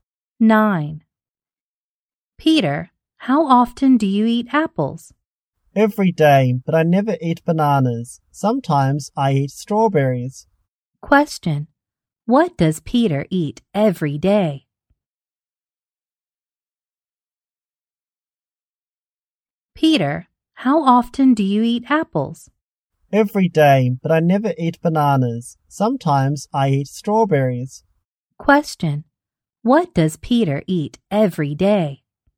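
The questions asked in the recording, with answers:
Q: What does Peter eat every day?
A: Apples.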